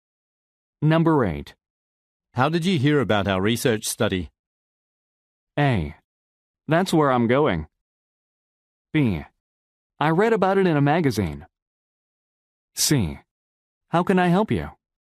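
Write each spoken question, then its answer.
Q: How did you hear about our research study?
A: B: I read about it in a magazine.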